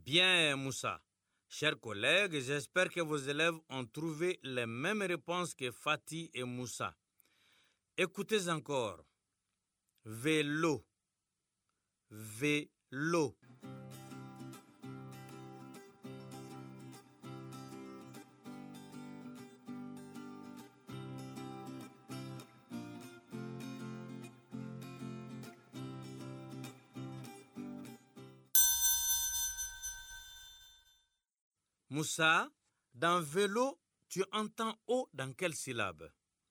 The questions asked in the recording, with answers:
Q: Moussa, dans vélo, tu entends O dans quelle syllabe?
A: Monsieur, dans l'eau, la deuxième syllabe.